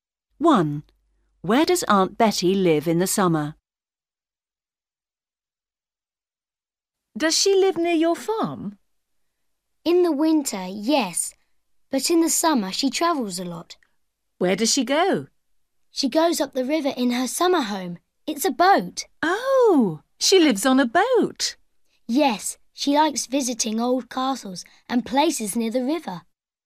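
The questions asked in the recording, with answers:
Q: Where does Aunt Betty live in the summer?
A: On a boat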